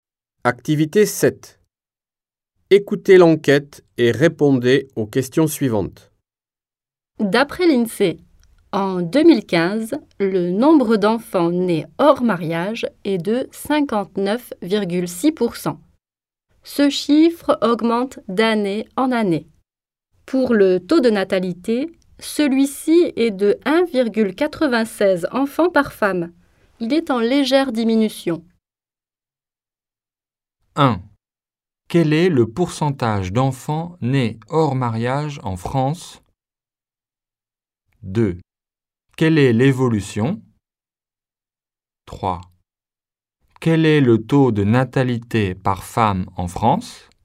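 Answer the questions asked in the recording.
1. 59,6 %
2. Il augmente d'année en année.
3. 1,96 enfant par femme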